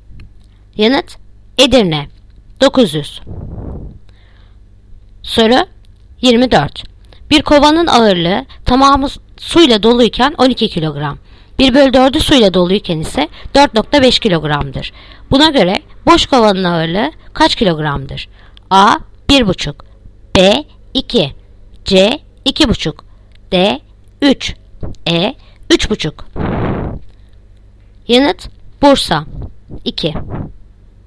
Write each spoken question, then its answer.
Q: Buna göre boş kovanın ağırlığı kaç kilogramdır?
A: Yanıt Bursa 2.